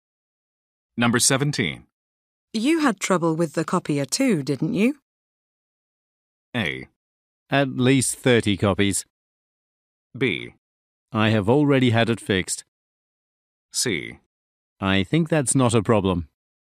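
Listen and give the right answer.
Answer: B: I have already had it fixed.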